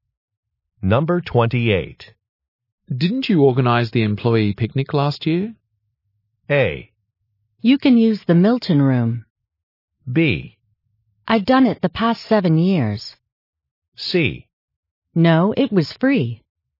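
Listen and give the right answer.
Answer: B: I've done it the past 7 years.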